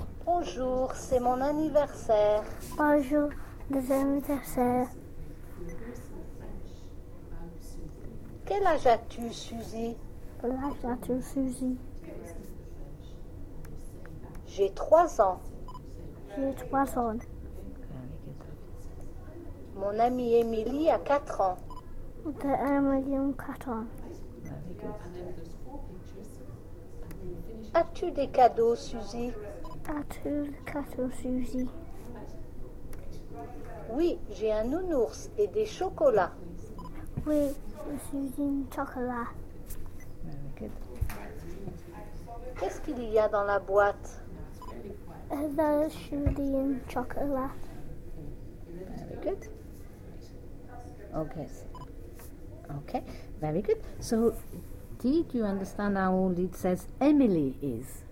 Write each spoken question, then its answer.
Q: So, did you understand how old it says Emily is?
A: Quatre ans.